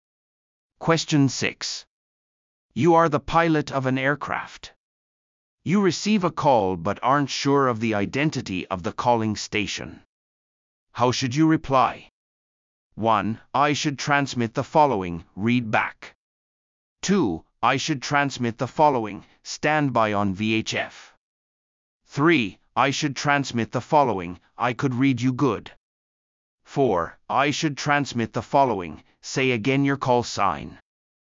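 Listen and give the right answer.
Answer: 4: I should transmit the following, say again your call sign.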